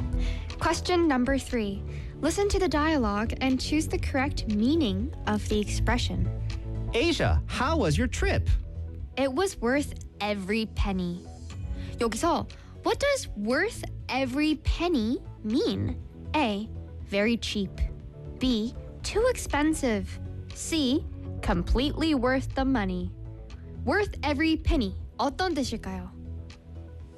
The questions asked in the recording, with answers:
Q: what does worth every penny mean?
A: 어떻게 맞췄습니다.